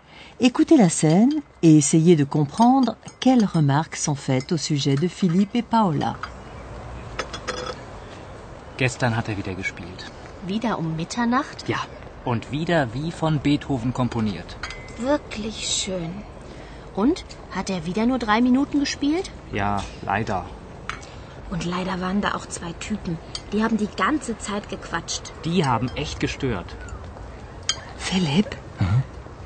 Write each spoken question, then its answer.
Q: Écoutez la scène et essayez de comprendre quelles remarques sont faites au sujet de Philippe et Paola.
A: La fille se plaint de deux types, Typen, qui ont passé leur temps à bavasser, quatschen.